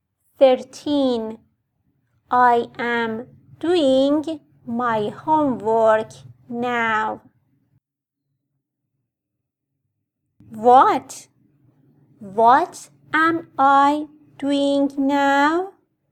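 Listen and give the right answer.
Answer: doing my homework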